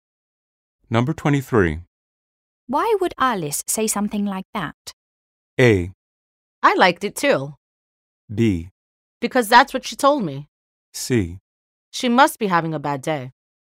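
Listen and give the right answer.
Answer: C: She must be having a bad day.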